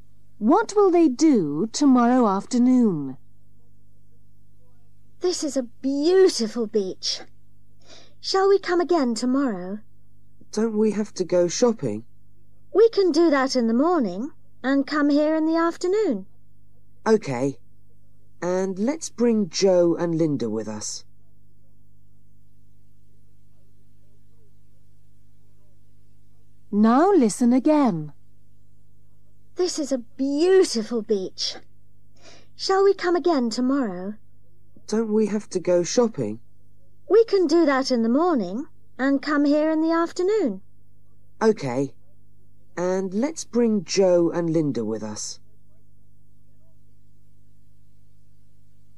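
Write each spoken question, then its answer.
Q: What will they do tomorrow afternoon?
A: Go to the beach (with Joe and Linda)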